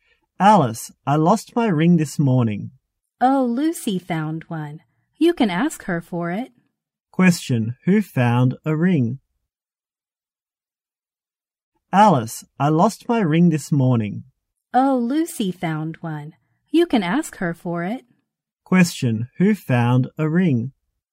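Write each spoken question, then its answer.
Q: Who found a ring?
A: Lucy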